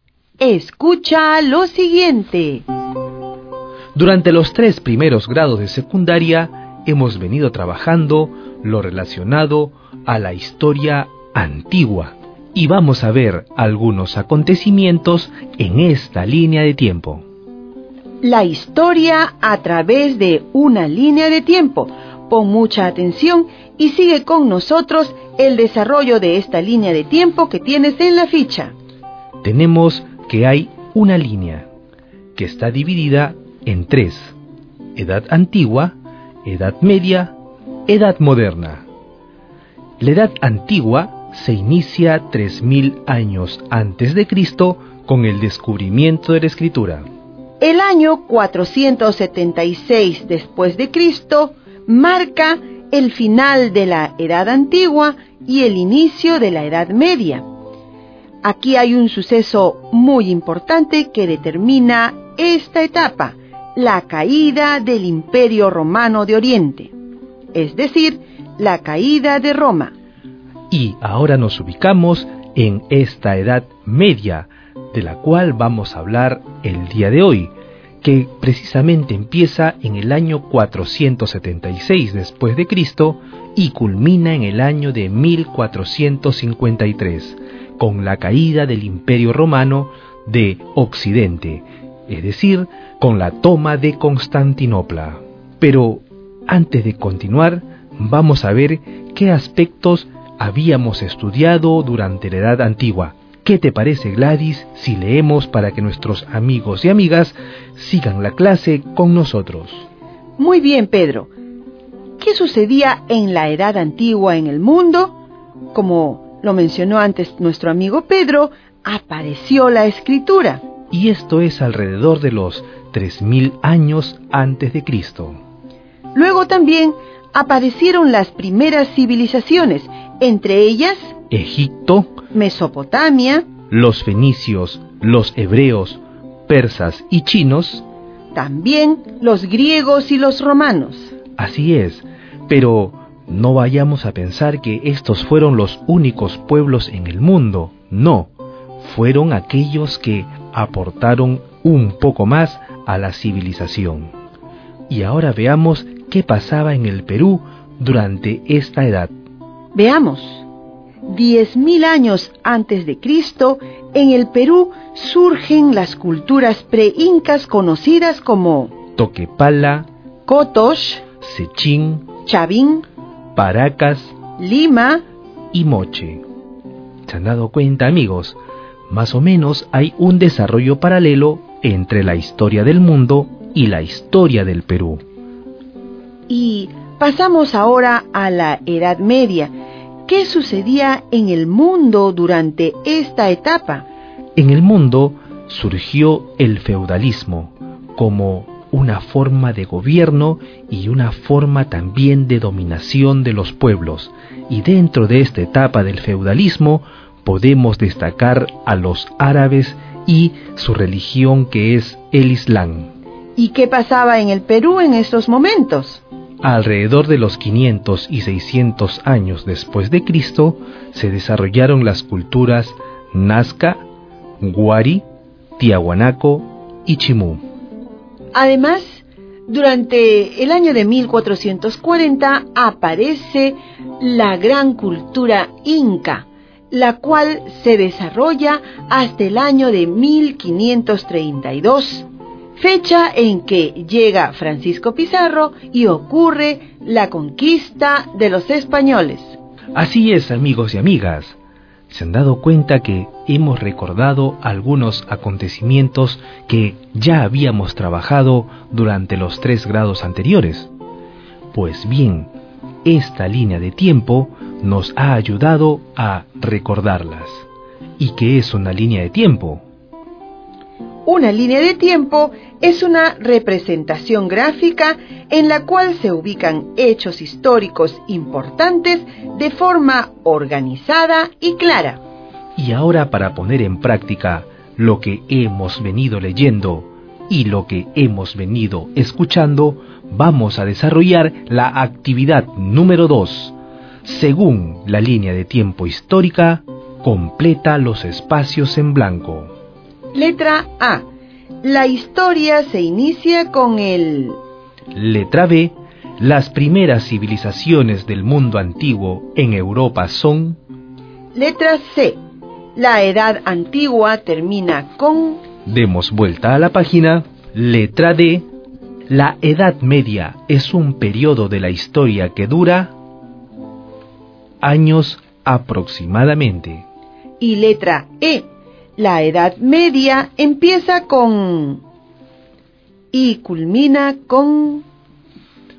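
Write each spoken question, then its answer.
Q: La historia se inicia con el...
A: descubrimiento de la escritura

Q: La edad antigua termina con...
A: la caída del Imperio Romano (año 476 d.C.)

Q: La edad media es un periodo de la historia que dura... años aproximadamente.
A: unos 977 años (476-1453)

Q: La Edad Media empieza con... y culmina con...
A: la caída de Roma (476); la toma de Constantinopla (1453)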